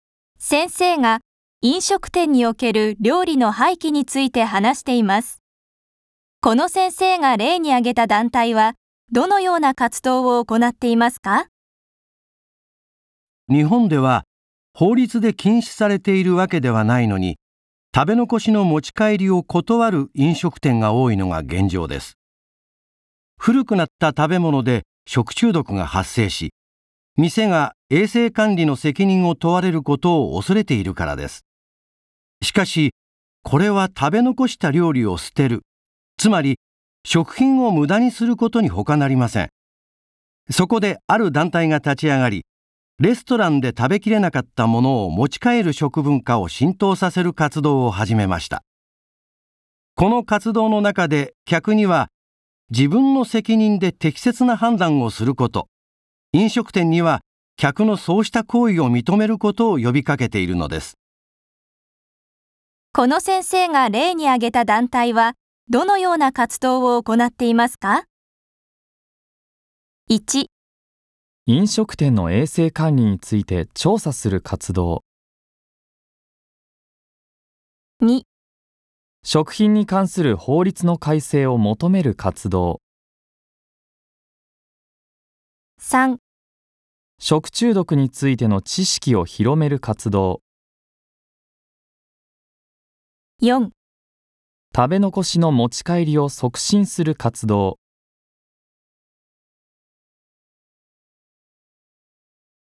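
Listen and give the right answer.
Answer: 4: 食べ残しの持ち帰りを促進する活動。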